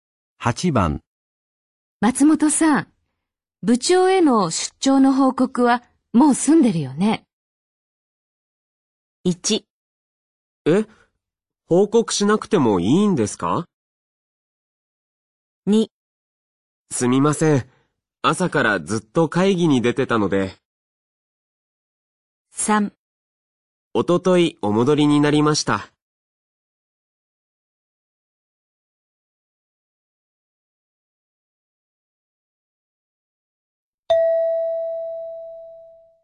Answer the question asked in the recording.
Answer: 2

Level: N3 Listening · Test 9